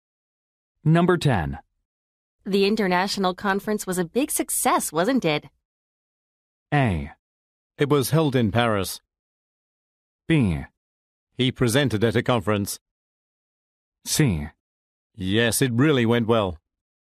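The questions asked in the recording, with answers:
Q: The international conference was a big success, wasn't it?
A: C: Yes, it really went well.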